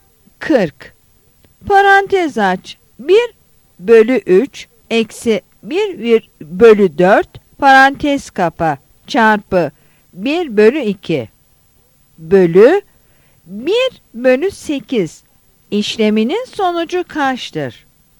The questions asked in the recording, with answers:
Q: Parantez aç. 1 bölü 3 eksi 1 bölü 4 parantez kapa çarpı 1 bölü 2 bölü 1 bölü 8 işleminin sonucu kaçtır?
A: Yanıt D'dir.